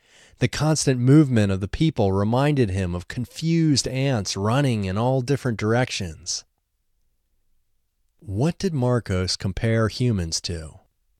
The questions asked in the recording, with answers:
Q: What did Marcos compare humans to?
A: Marcos compared humans to confused ants running in all different directions.